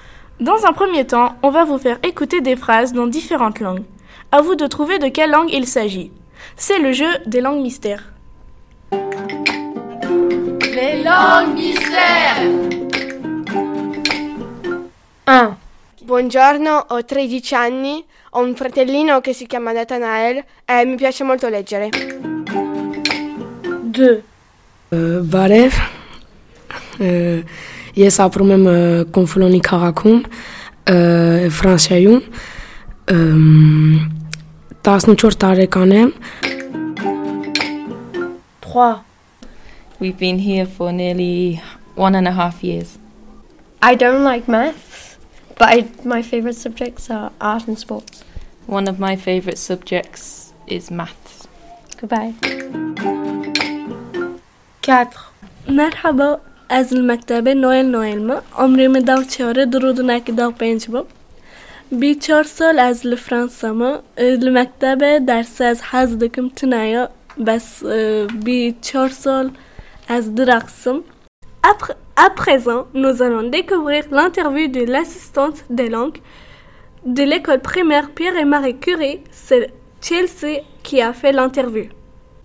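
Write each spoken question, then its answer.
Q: À vous de trouver de quelle langue il s'agit.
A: l'italien

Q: À vous de trouver de quelle langue il s'agit.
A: l'anglais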